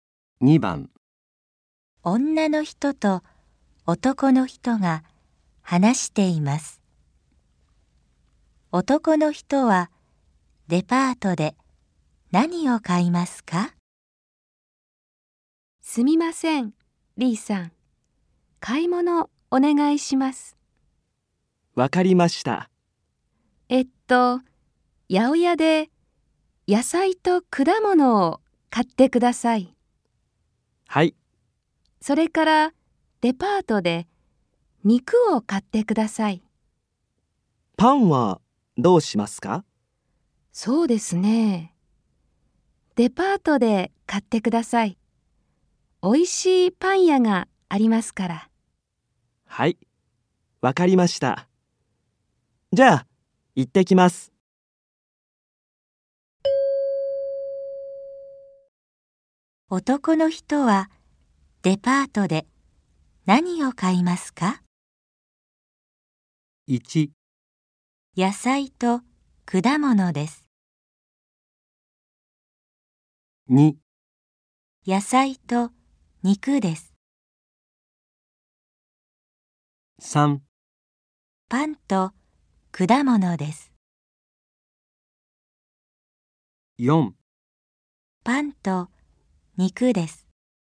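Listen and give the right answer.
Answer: 4: パンと肉です。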